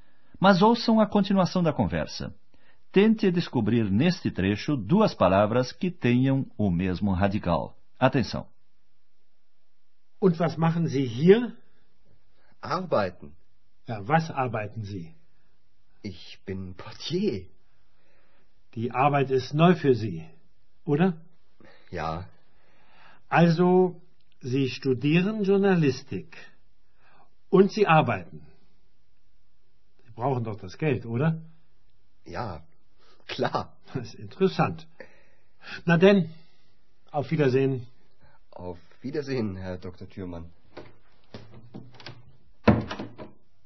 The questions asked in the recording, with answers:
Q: Tente descobrir neste trecho duas palavras que tenham o mesmo radical.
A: As duas palavras com o mesmo radical são trabalhar e trabalho.